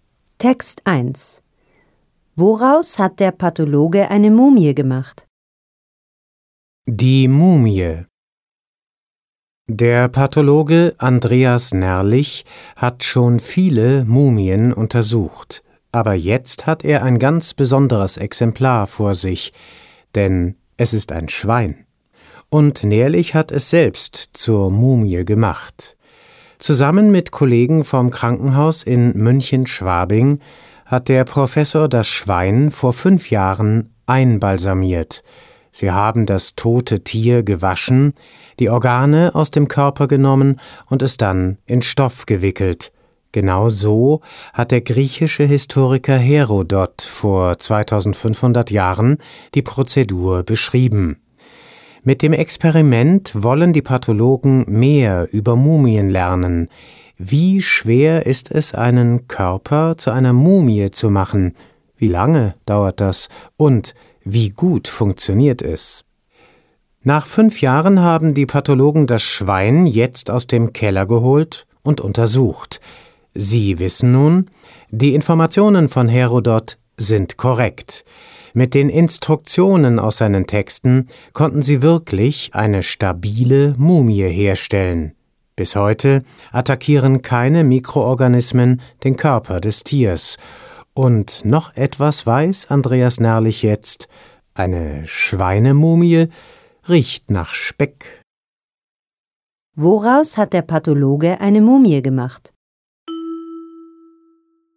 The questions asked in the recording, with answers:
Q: Woraus hat der Pathologe eine Mumie gemacht?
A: Er hat eine Mumie aus einem Schwein gemacht.